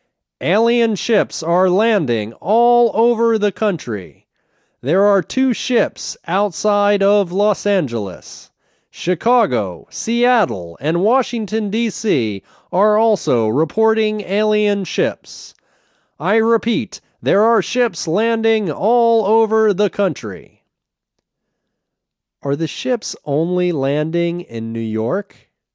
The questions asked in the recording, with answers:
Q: Are the ships only landing in New York?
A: No, the ships aren't only landing in New York.